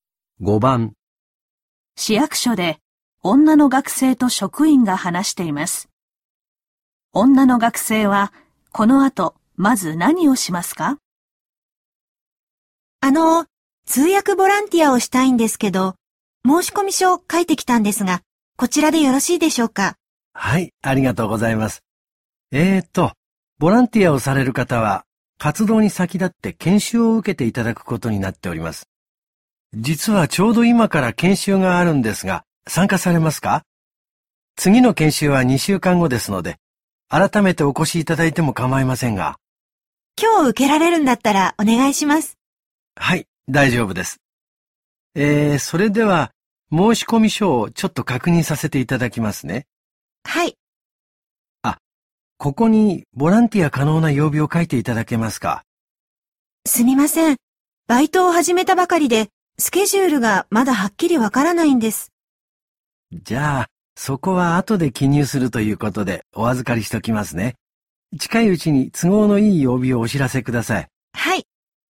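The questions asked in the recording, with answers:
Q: 女の学生はこの後まず何をしますか?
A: 研修を受ける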